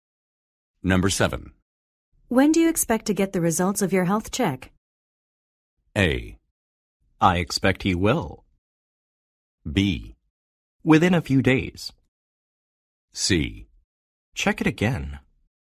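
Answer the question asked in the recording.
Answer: B: Within a few days.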